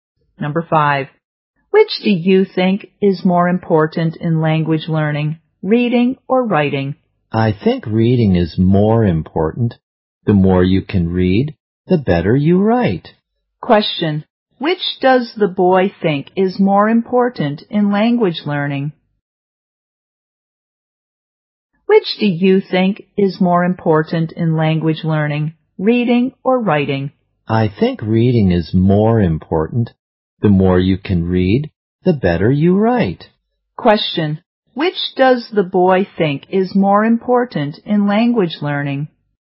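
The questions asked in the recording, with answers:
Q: which does the boy think is more important in language learning?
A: Reading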